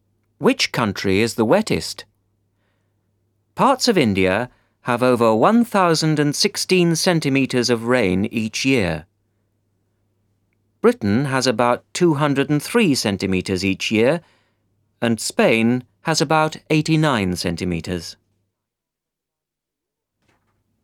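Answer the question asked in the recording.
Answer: India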